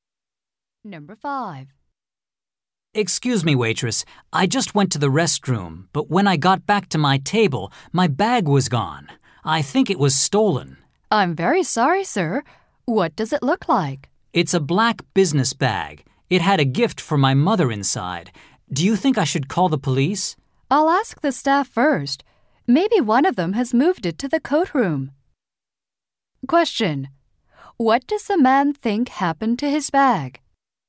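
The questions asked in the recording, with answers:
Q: What does the man think happened to his bag?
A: It was stolen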